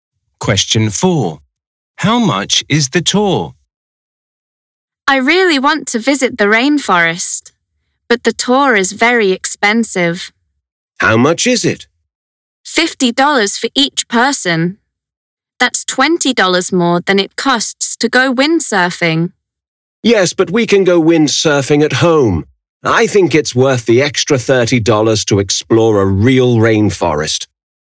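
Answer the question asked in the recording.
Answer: $50 per person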